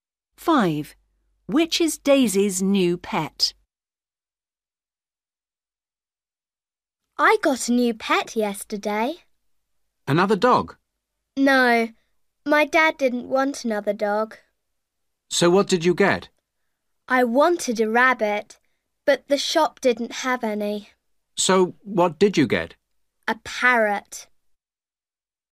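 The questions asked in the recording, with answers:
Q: Which is Daisy's new pet?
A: a parrot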